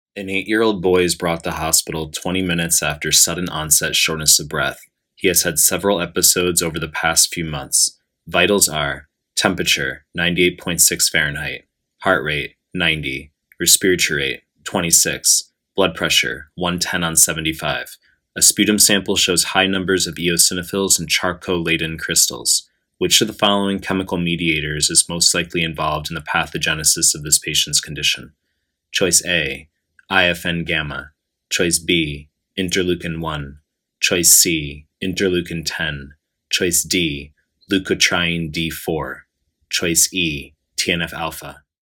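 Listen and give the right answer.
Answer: D: leukotriene D4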